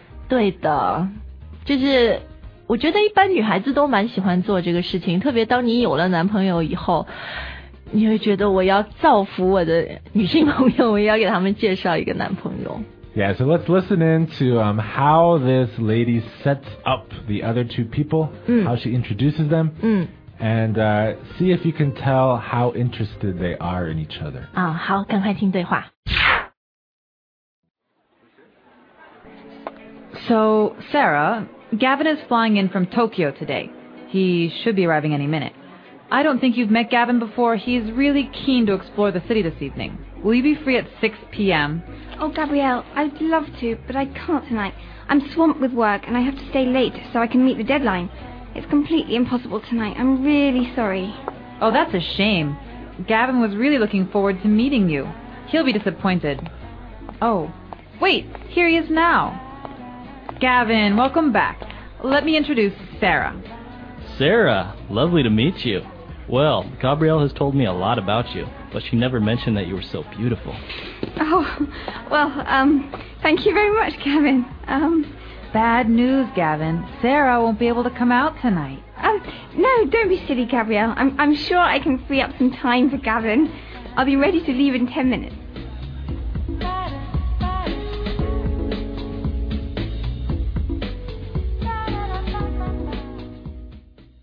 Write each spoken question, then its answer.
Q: see if you can tell how interested they are in each other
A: She seems pretty interested too, huh?